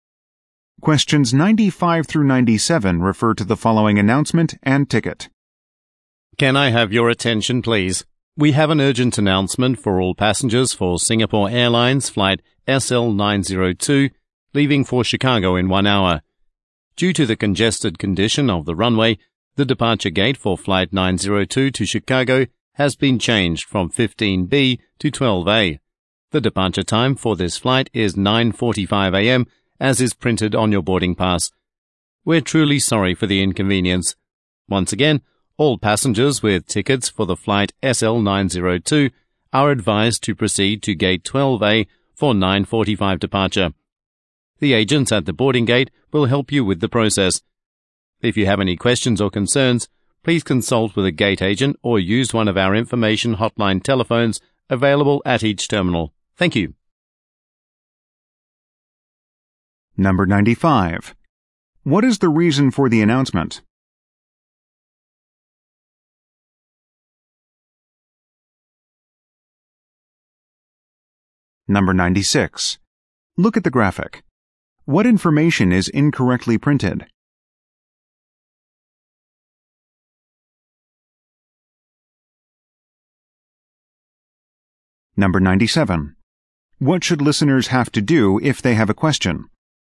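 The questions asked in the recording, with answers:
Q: What is the reason for the announcement?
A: A gate change

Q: What should listeners have to do if they have a question?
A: Ask a gate agent or use an information hotline telephone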